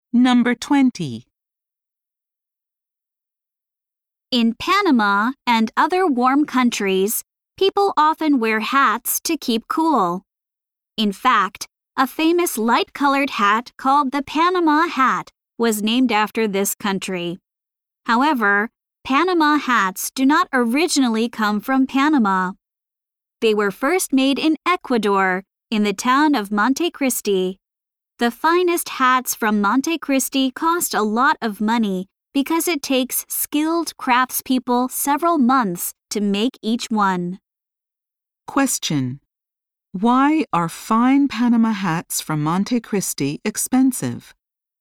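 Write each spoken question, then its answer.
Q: why are fine Panama hats from Monte Cristi expensive?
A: It takes skilled craftspeople several months to make each one.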